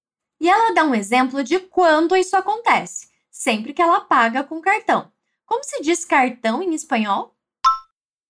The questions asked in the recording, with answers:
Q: Como se diz cartão em espanhol?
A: Bien, tarjeta.